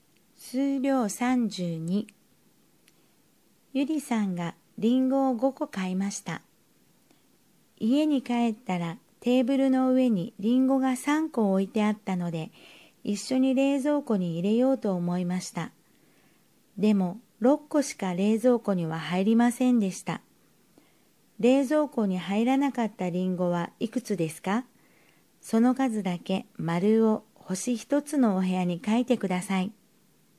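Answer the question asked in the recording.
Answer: 2個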